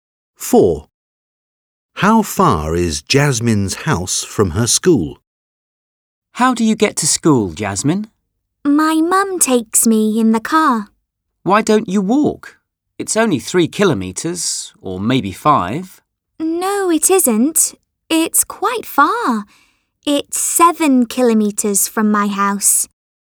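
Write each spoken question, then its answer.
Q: How far is Jasmine's house from her school?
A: 7 kilometres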